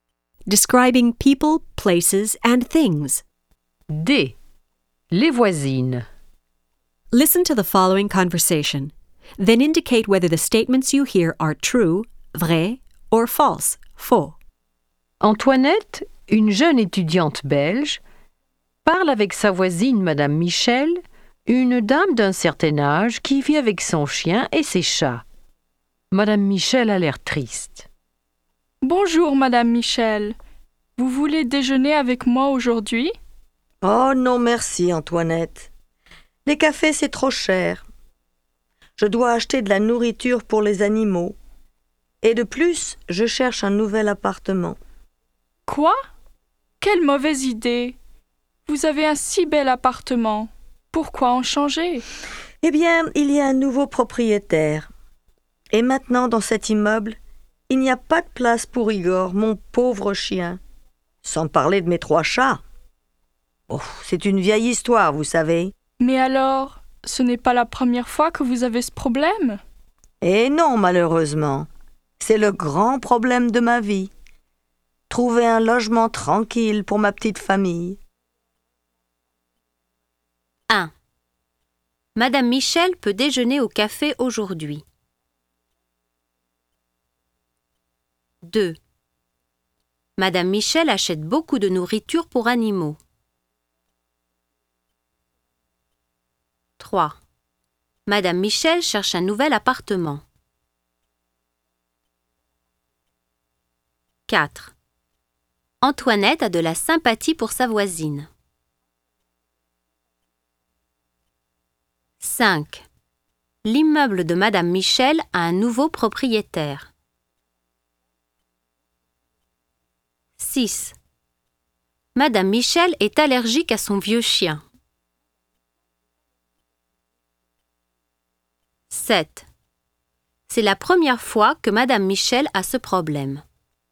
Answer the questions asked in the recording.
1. 1. Faux.
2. 2. Vrai.
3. 3. Vrai.
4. 4. Vrai.
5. 5. Vrai.
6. 6. Faux.
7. 7. Faux.